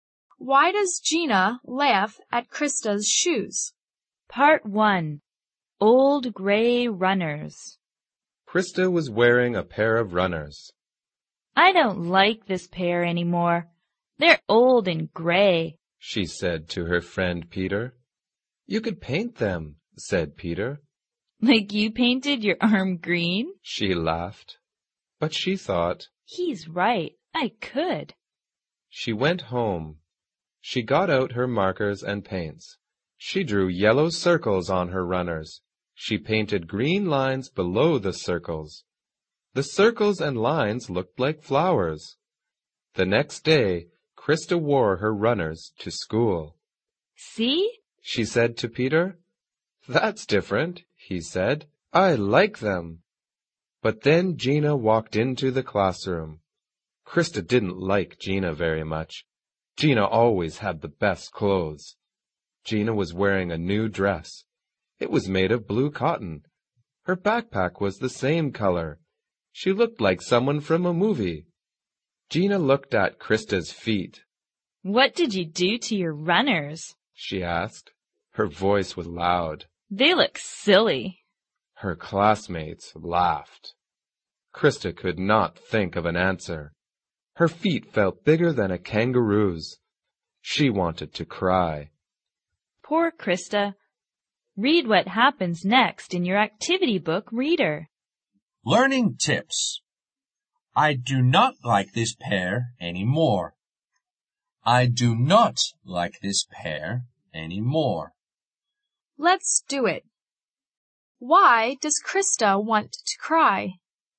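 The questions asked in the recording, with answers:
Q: Why does Gina laugh at Krista's shoes?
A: Because Krista painted her runners and Gina thinks they look silly

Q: Why does Krista want to cry?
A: Because Gina said her runners looked silly and the classmates laughed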